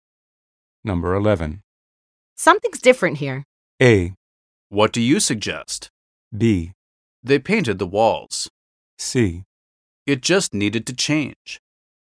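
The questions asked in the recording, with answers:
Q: Something's different here.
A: B: They painted the walls.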